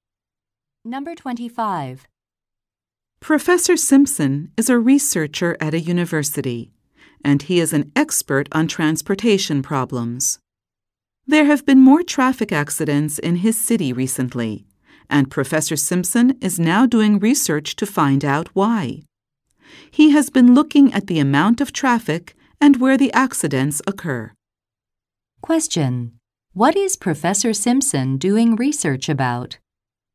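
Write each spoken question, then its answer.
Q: What is Professor Simpson doing research about?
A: Why there have been more traffic accidents in his city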